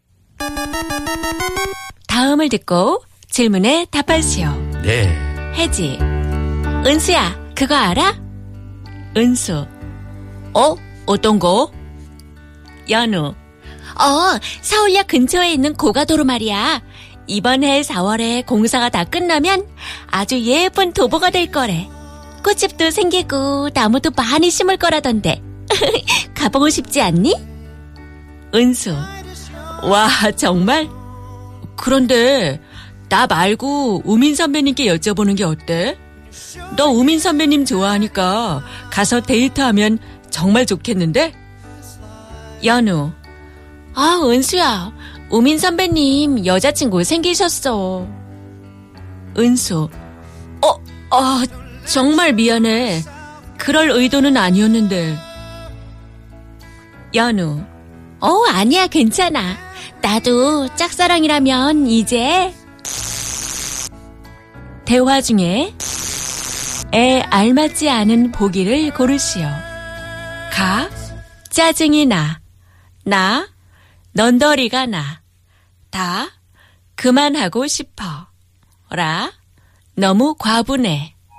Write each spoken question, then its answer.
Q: 대화 중에 에 알맞지 않은 보기를 고르시오.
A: 라 너무 과분해.